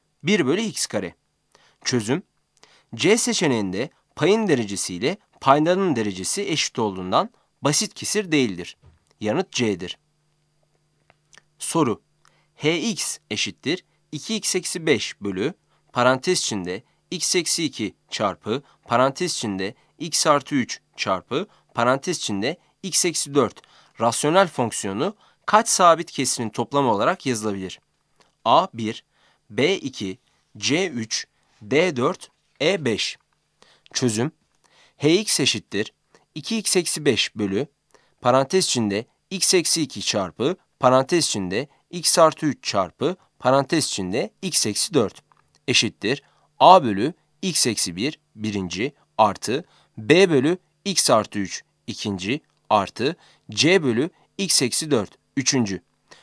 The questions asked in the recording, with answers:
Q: hx eşittir 2x eksi 5 bölü parantez içinde x eksi 2 çarpı parantez içinde x artı 3 çarpı parantez içinde x eksi 4 rasyonel fonksiyonu kaç sabit kesirin toplamı olarak yazılabilir?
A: Yanıt c'dir.